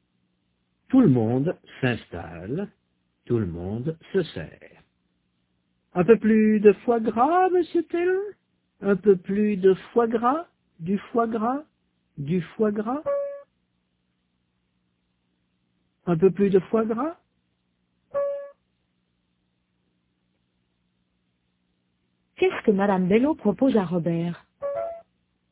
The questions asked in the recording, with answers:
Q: Qu'est-ce que madame Bello propose à Robert?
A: Un peu plus de foie gras.